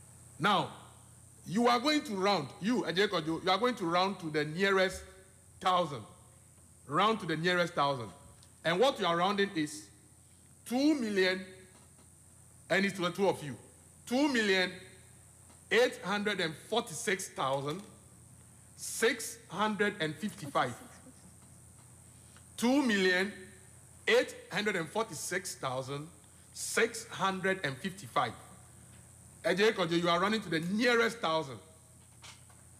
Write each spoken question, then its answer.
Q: Ajay Kojo, you are running to the nearest 1,000.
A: 2,847,000.